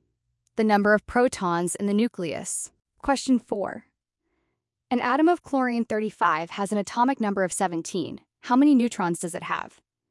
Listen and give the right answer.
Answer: 35 minus 17 equals 18 neutrons.